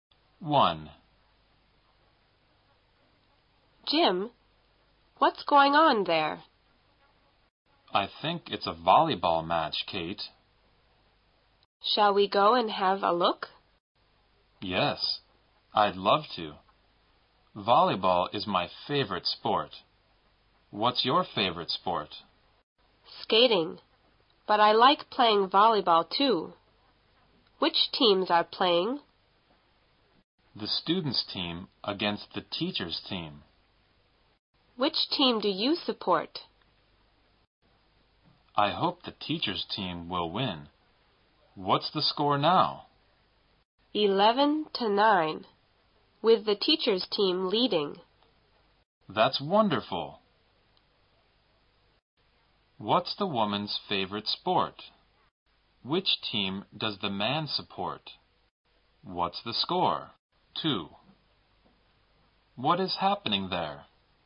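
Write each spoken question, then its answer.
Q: What's the score?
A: 11-9, teachers' team leading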